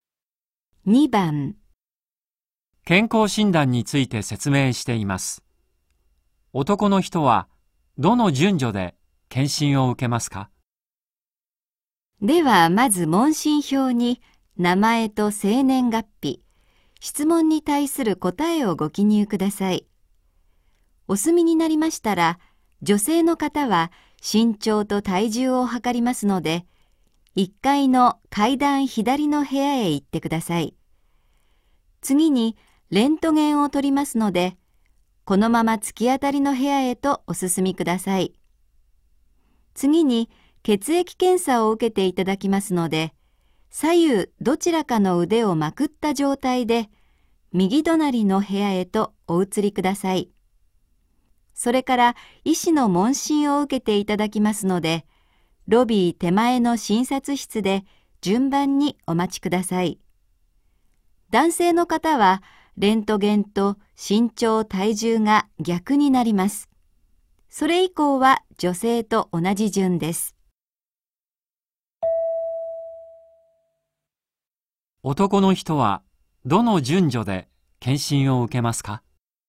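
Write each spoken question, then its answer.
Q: 男の人はどの順序で検診を受けますか?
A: 問診票の記入→レントゲン→身長・体重→血液検査→医師の問診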